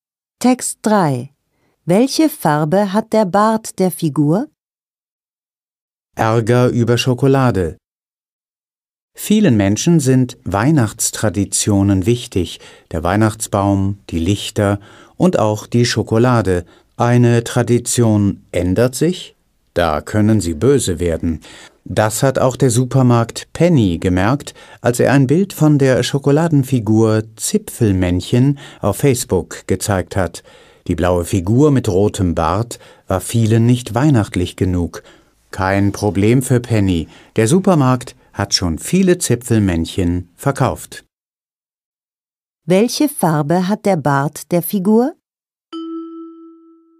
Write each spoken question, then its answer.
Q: Welche Farbe hat der Bart der Figur?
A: Der Bart ist rot.